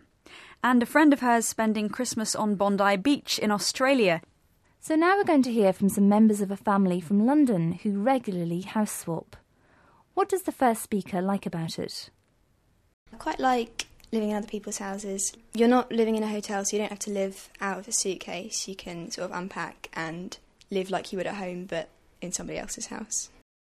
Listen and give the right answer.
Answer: She said she likes being able to unpack and doesn't have to live out of a suitcase.